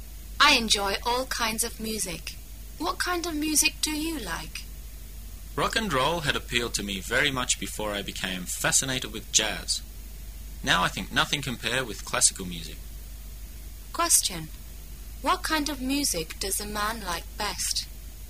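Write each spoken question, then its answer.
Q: What kind of music does a man like best?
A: Classical music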